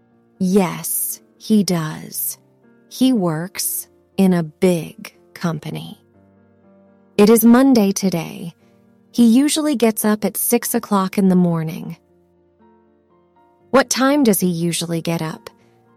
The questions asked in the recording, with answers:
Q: What time does he usually get up?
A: At 6.